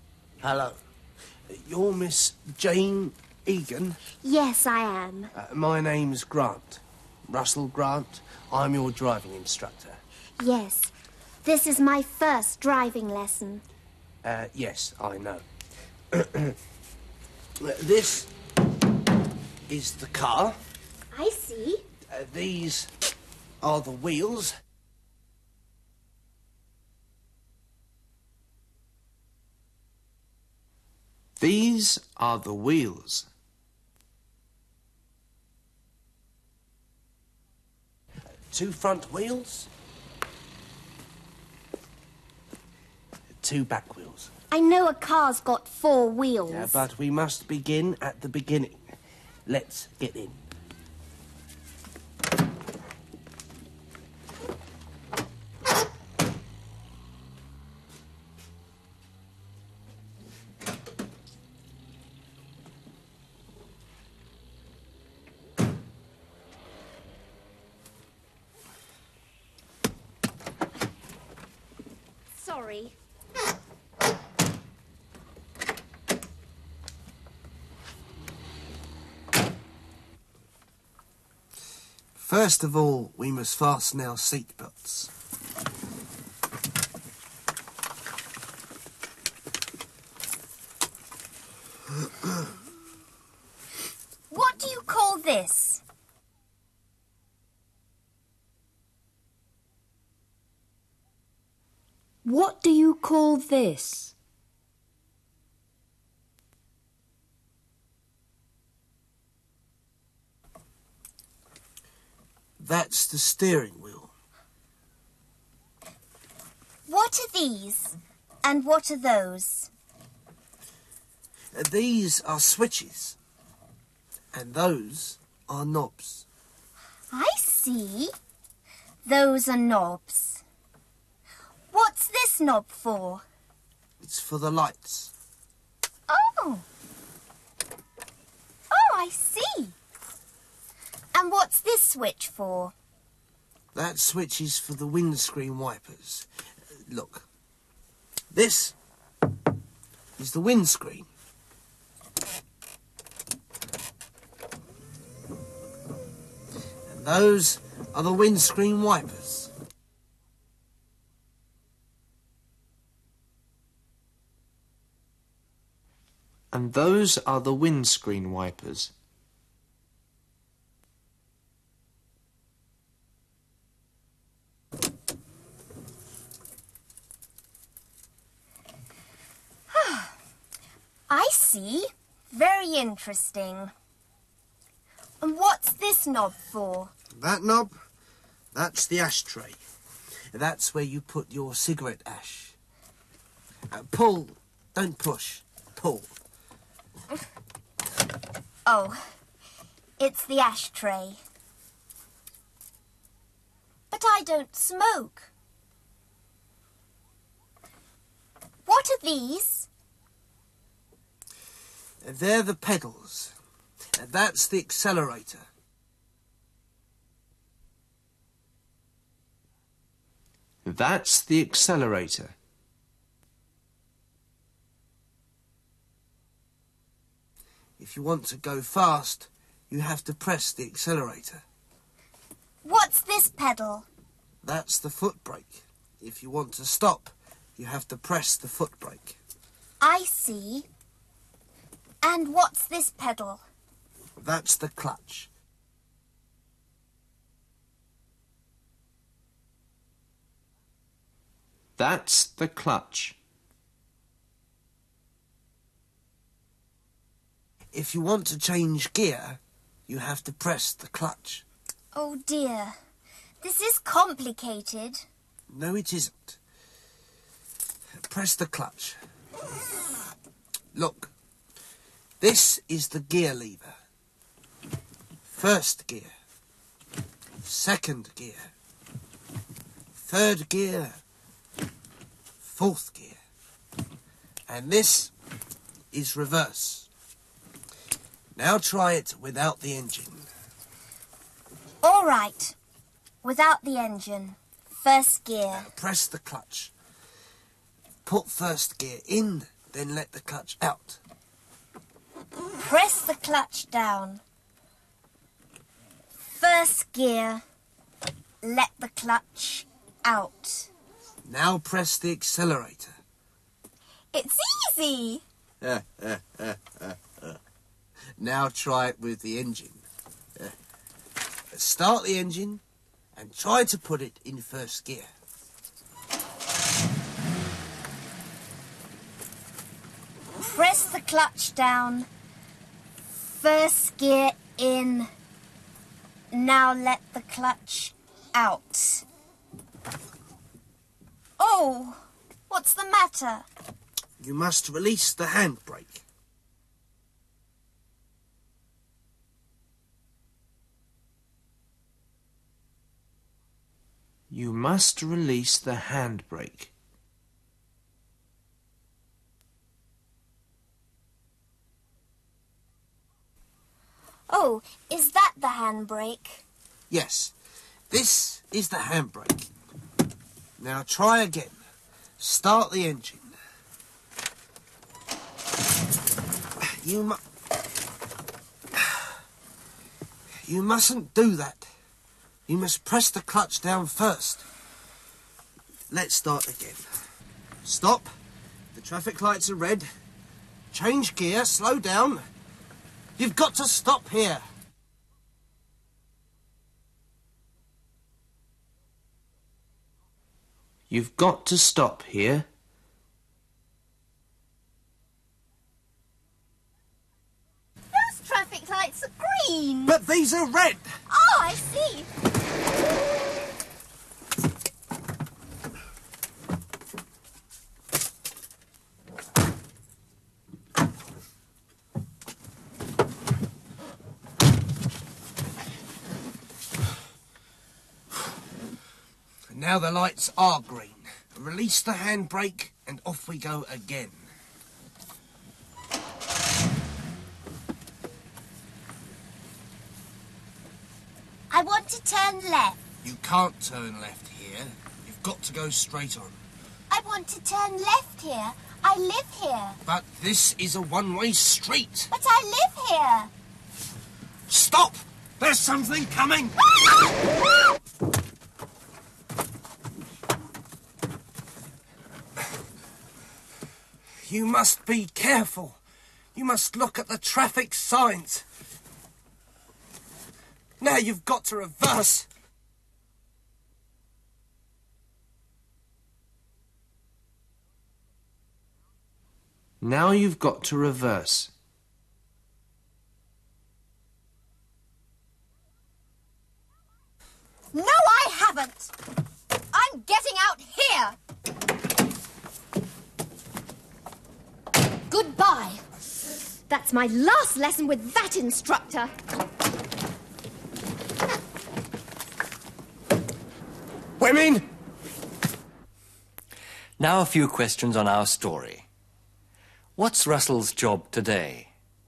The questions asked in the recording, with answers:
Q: What's Russell's job today?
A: He's a driving instructor.